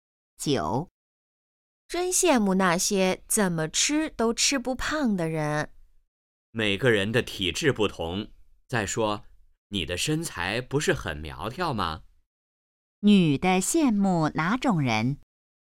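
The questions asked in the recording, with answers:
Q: 女的羡慕哪种人?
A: 怎么吃都吃不胖的人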